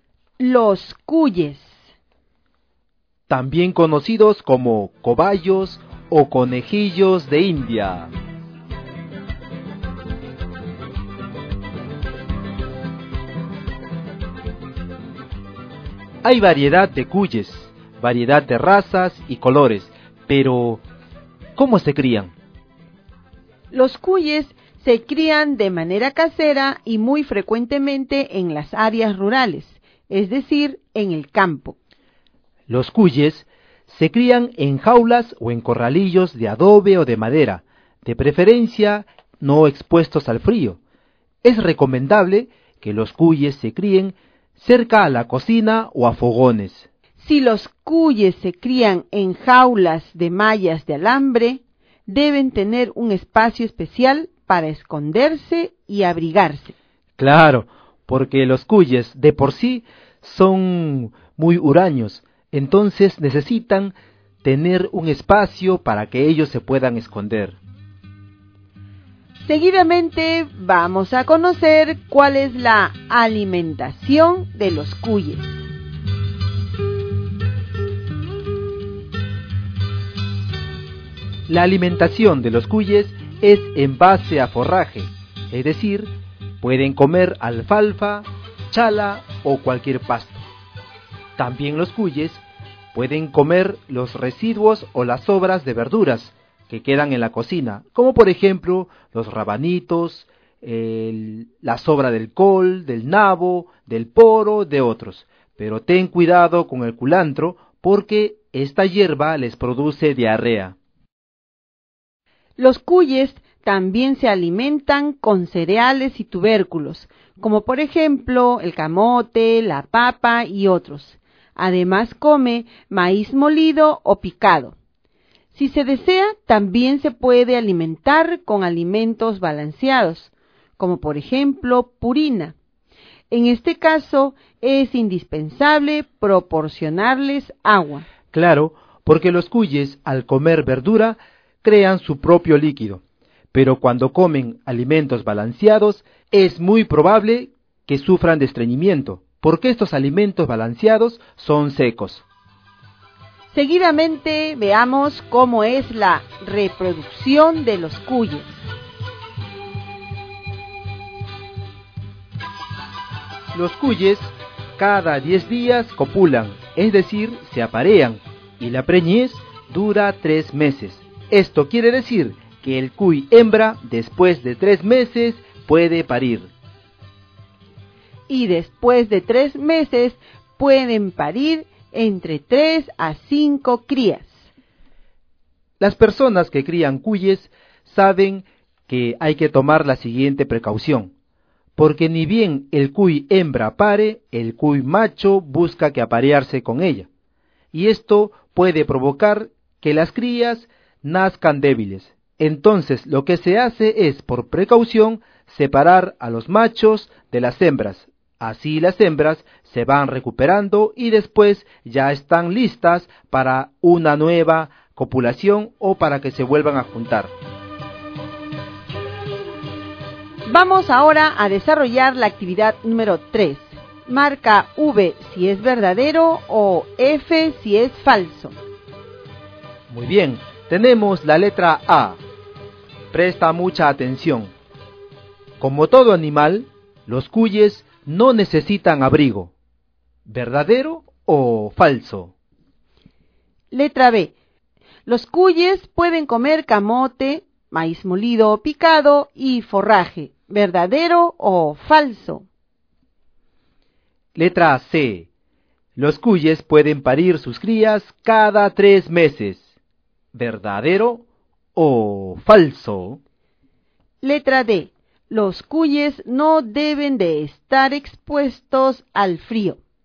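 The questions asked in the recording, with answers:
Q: Como todo animal, los cuyes no necesitan abrigo.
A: Falso

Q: Los cuyes pueden comer camote, maíz molido o picado y forraje.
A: Verdadero

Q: Los cuyes pueden parir sus crías cada 3 meses.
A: Verdadero

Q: Los cuyes no deben de estar expuestos al frío.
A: Verdadero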